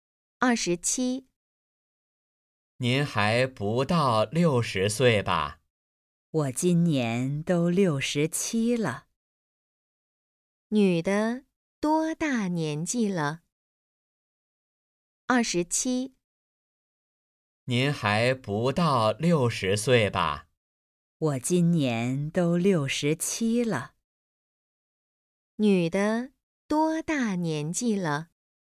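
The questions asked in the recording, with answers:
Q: 女的多大年纪了?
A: 67岁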